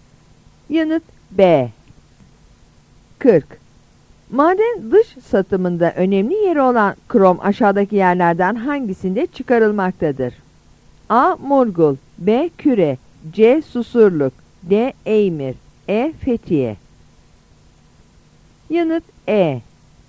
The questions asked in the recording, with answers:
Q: Maden dış satımında önemli yeri olan krom aşağıdaki yerlerden hangisinde çıkarılmaktadır?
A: Yanıt E.